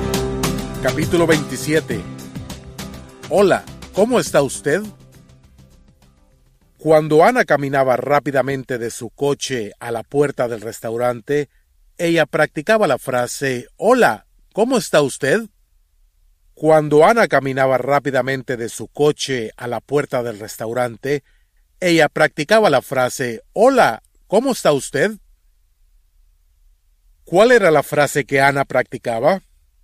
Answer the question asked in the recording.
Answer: Hola, ¿cómo está usted?